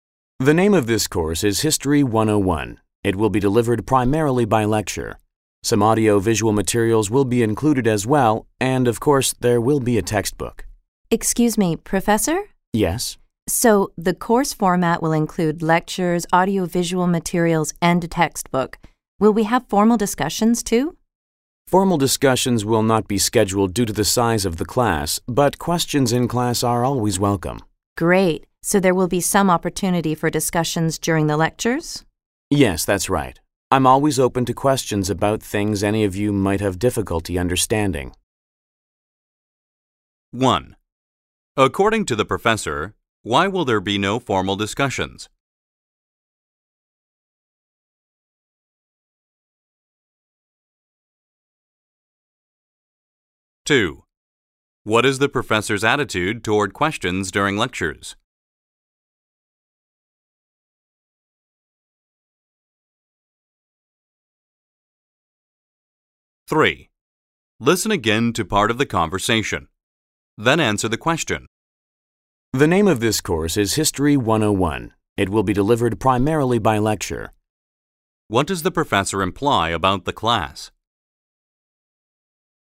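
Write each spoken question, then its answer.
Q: According to the professor, why will there be no formal discussions?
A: Because the class is too large

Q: What is the professor's attitude toward questions during lectures?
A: He welcomes them and is open to questions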